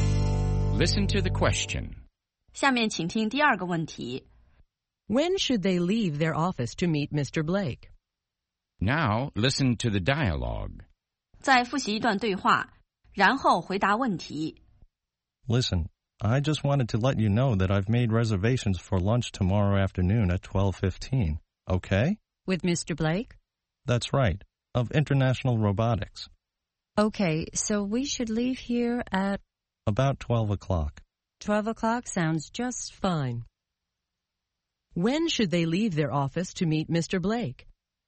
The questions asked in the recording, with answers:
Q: When should they leave their office to meet Mr. Blake?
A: They should leave their office at 12 o'clock.